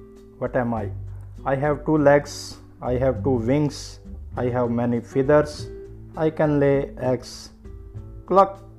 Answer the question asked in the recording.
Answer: I am a hen.